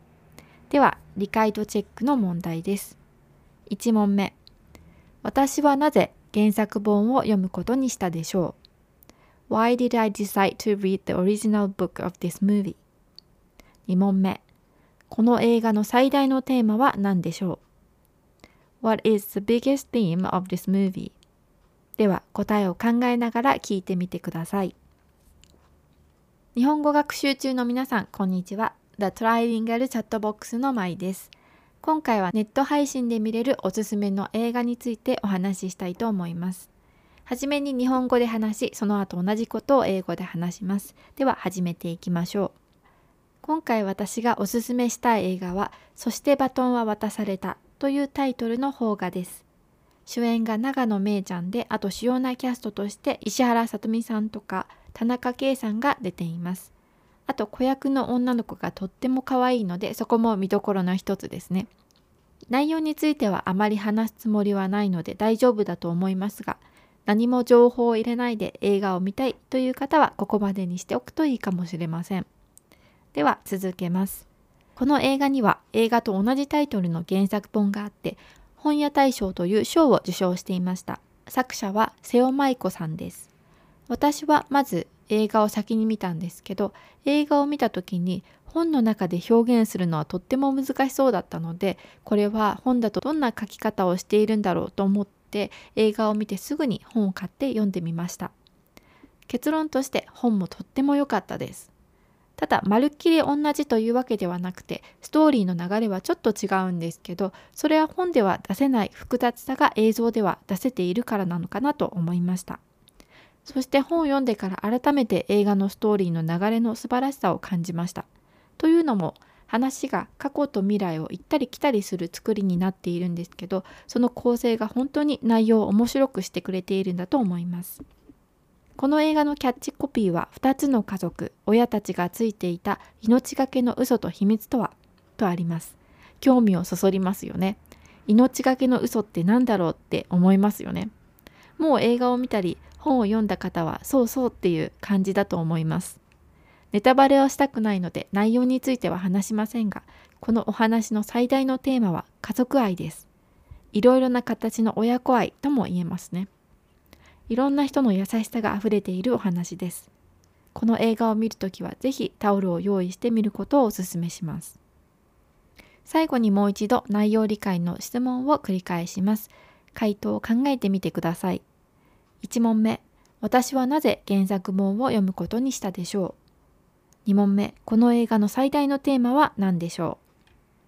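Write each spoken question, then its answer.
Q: 私はなぜ原作本を読むことにしたでしょう?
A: 映画を見て、本の中で表現するのはとても難しそうだったので、本ではどんな書き方をしているのか知りたかったから

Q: この映画の最大のテーマは何でしょう?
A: 家族愛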